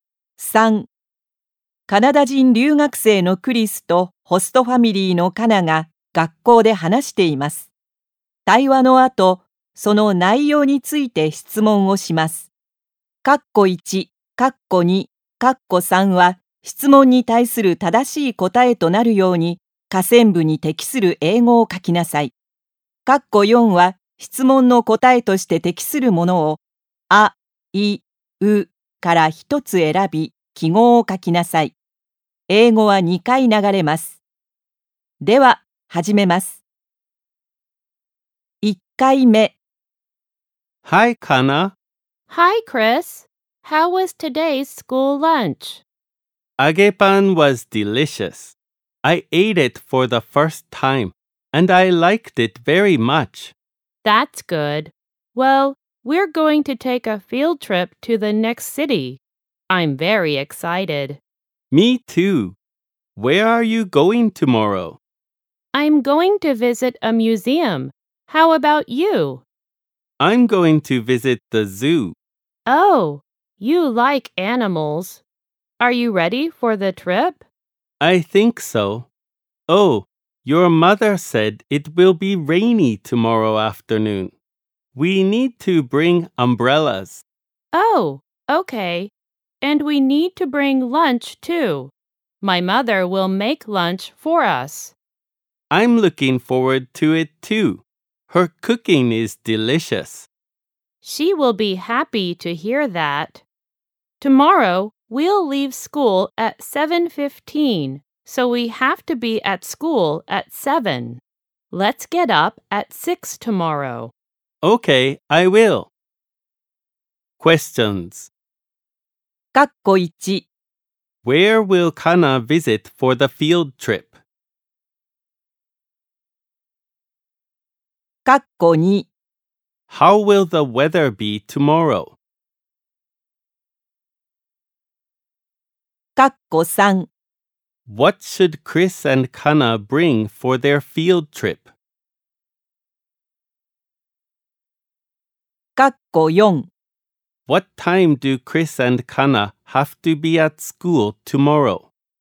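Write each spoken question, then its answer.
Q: How will the weather be tomorrow?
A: It will be rainy in the afternoon.

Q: What should Chris and Kana bring for their field trip?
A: Umbrellas and lunch.

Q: What time do Chris and Kana have to be at school tomorrow?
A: At 7:00.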